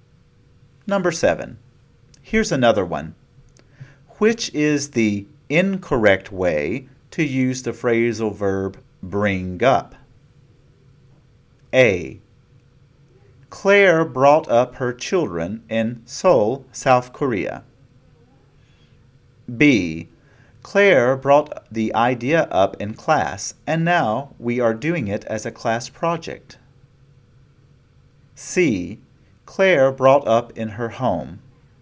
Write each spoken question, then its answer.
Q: Which is the incorrect way to use the phrasal verb bring up?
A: C. Claire brought up in her home is incorrect.